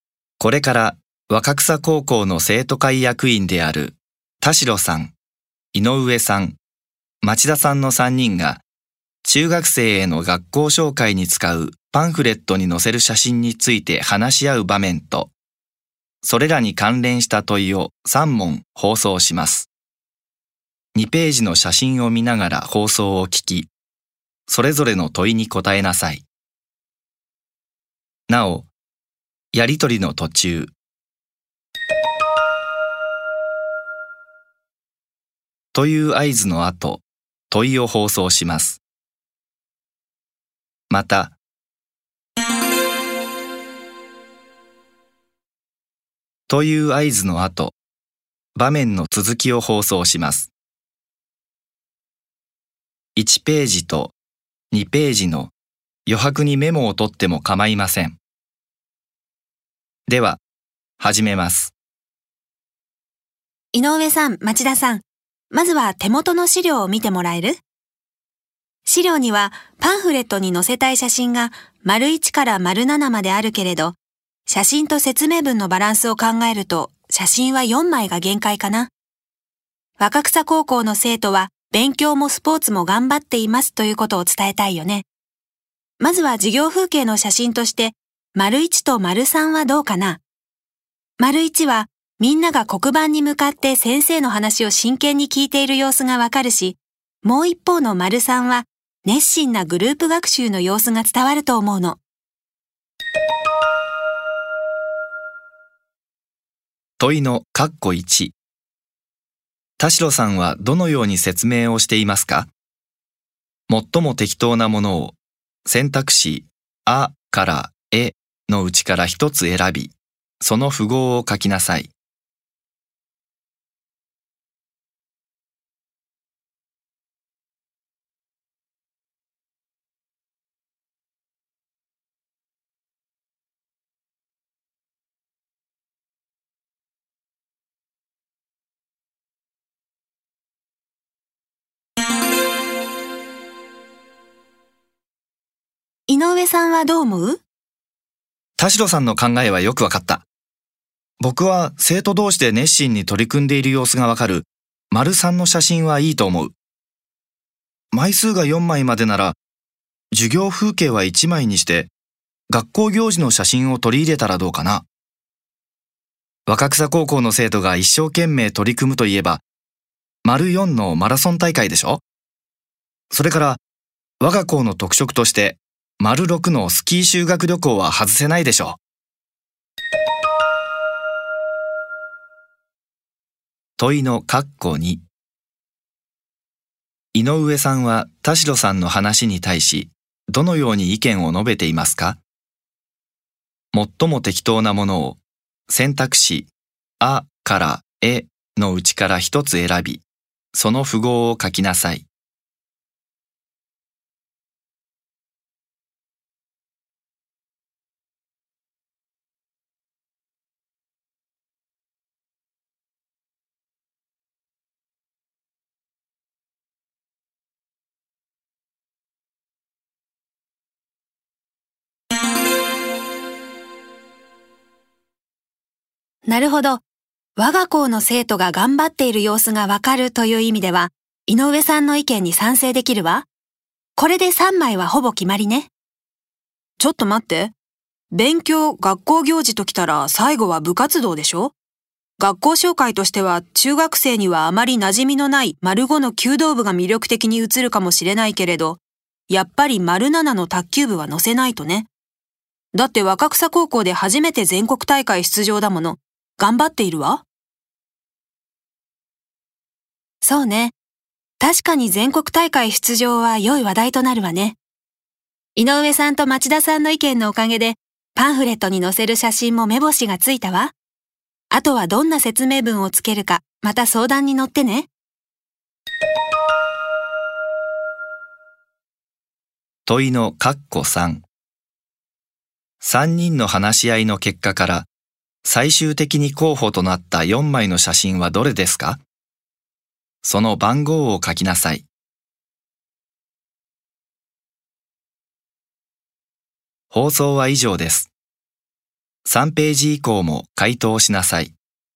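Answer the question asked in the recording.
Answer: 3、4、6、7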